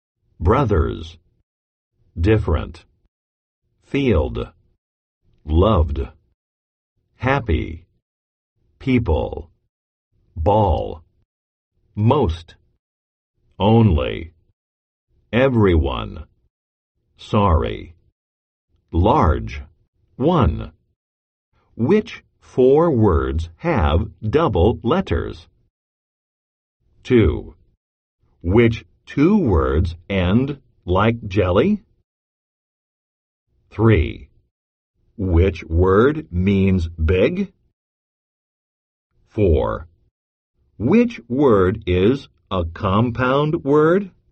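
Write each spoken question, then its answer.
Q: Which four words have double letters?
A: different, happy, ball, sorry

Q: Which word means big?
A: large

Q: Which word is a compound word?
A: everyone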